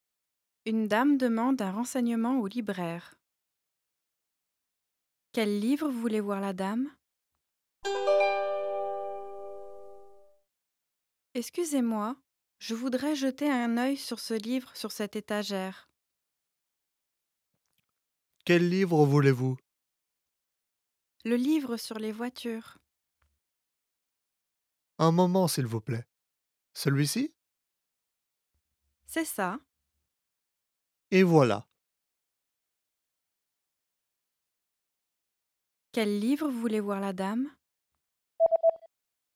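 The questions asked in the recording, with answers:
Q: Quel livre voulait voir la dame?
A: Le livre sur les voitures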